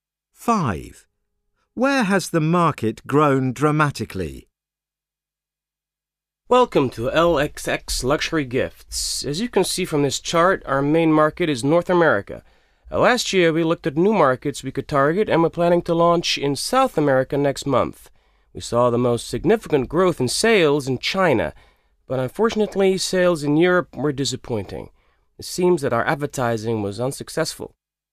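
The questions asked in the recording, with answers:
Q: Where has the market grown dramatically?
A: China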